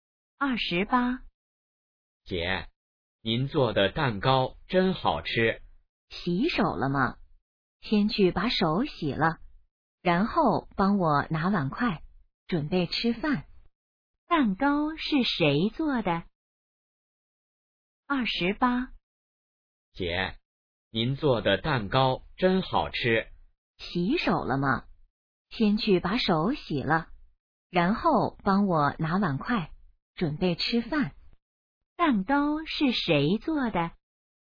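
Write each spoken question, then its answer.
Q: 蛋糕是谁做的?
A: 姐姐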